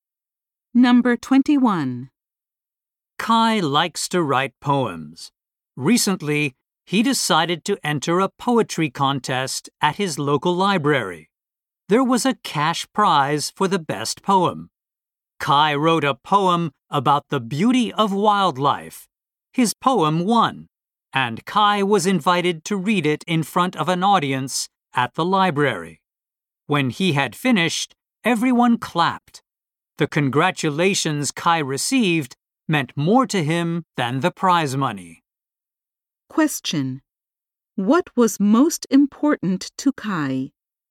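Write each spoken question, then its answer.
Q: What was most important to Kai?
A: The congratulations he received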